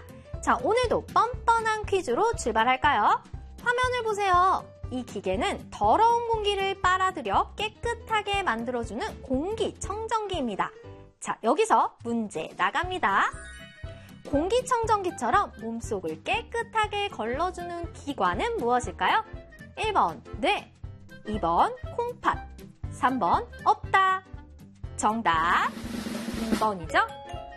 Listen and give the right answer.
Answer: 정답 2번이죠?